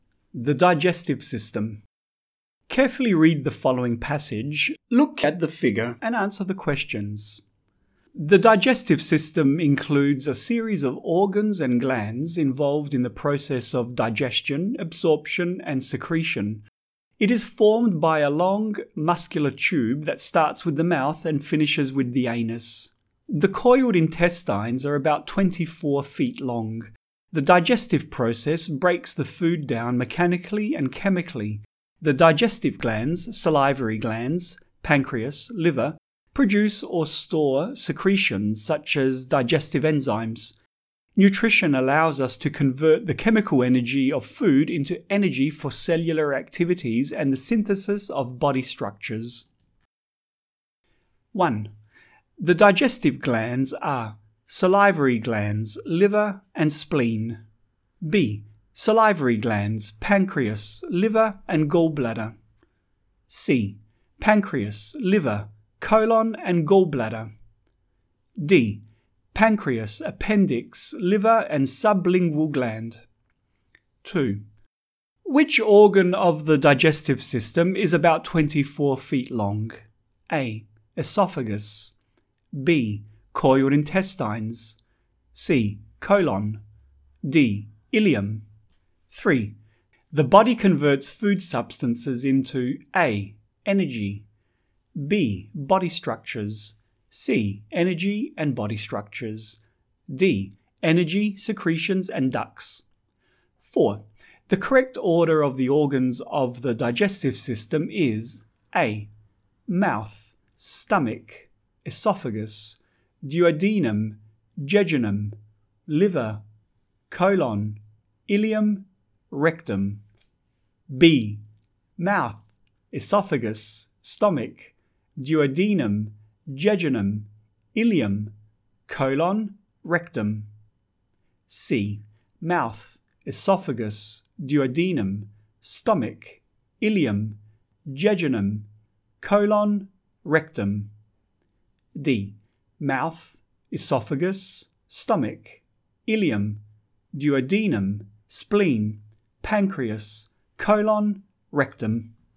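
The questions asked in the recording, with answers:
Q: Which organ of the digestive system is about 24 feet long?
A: B: Coiled intestines.

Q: The body converts food substances into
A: C: Energy and body structures.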